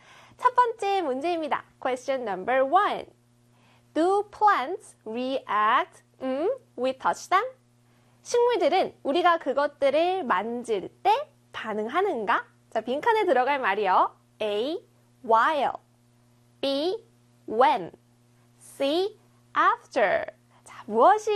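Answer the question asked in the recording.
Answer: B: when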